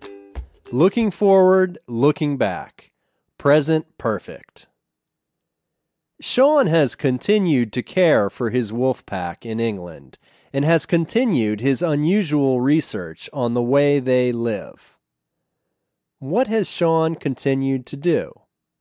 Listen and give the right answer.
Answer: He has continued to take care of his wolf pack.